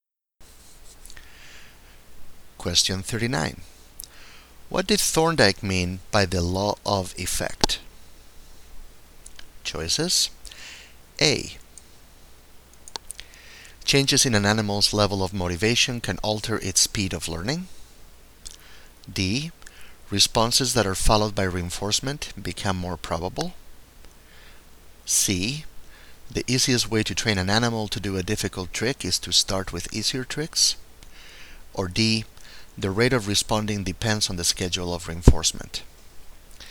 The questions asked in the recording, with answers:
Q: What did Thorndike mean by the law of effect?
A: And the correct choice here is B.